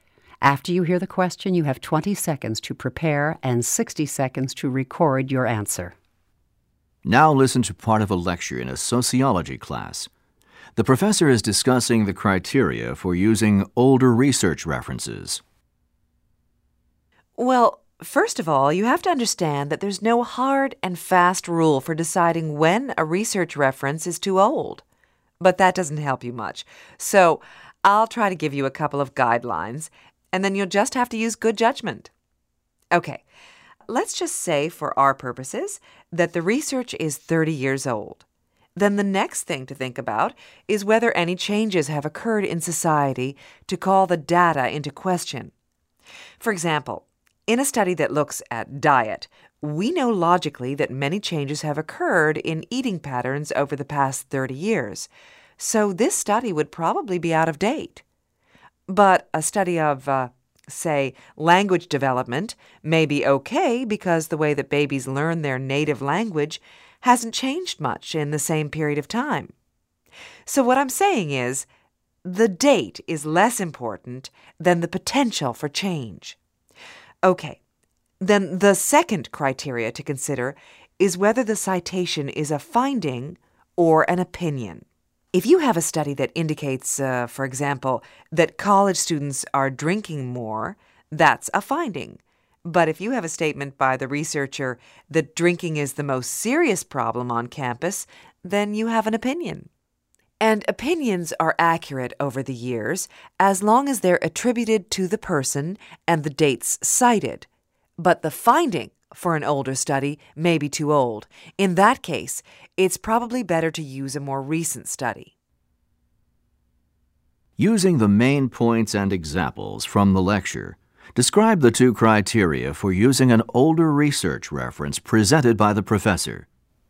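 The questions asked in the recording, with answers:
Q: Using the main points and examples from the lecture, describe the two criteria for using an older research reference presented by the professor.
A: First, ask whether society has changed in ways that call the data into question (a diet study may be out of date, but a language development study may not). Second, ask whether it is a finding or an opinion: opinions stay usable if attributed with dates, but old findings may need a newer study.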